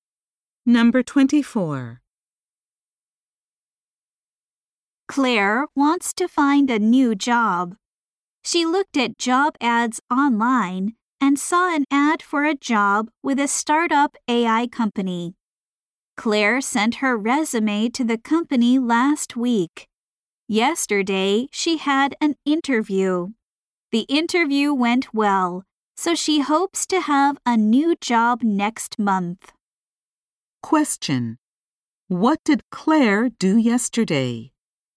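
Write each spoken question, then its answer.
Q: What did Claire do yesterday?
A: She had a job interview.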